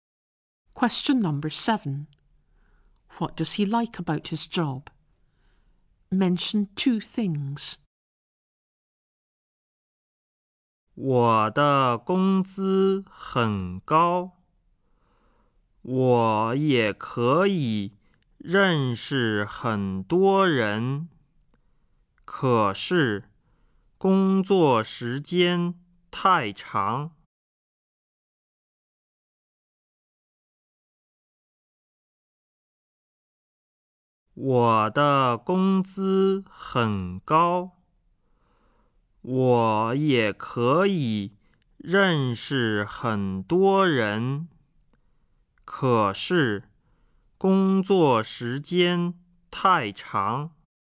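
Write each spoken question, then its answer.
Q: What does he like about his job?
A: The pay is high and he can meet lots of people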